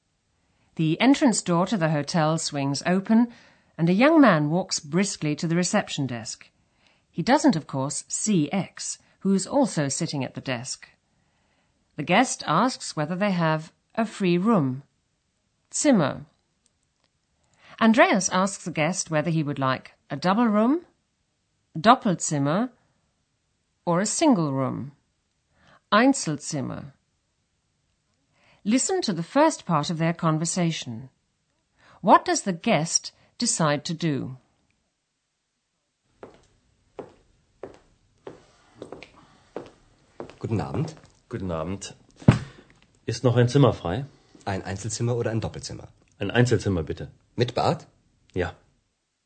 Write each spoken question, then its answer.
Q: What does the guest decide to do?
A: the guest decides to take a single room with bath, mit Bad.